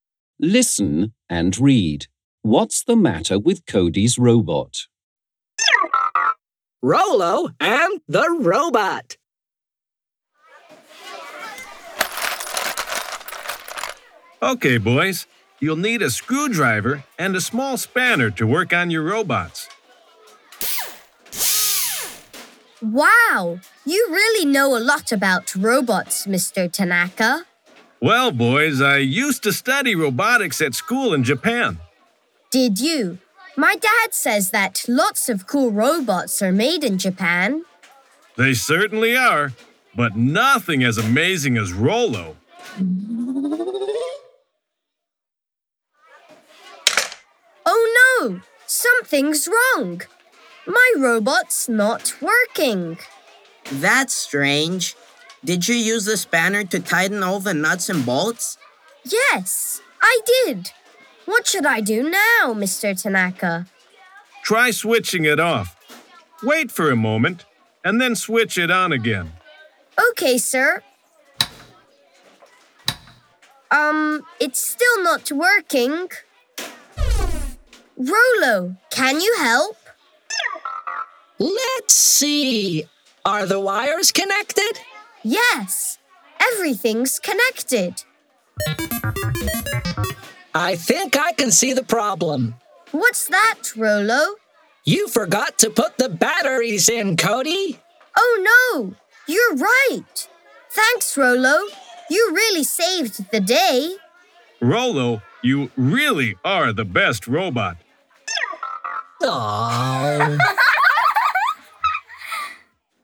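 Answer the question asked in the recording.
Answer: It's not working because Cody forgot to put the batteries in.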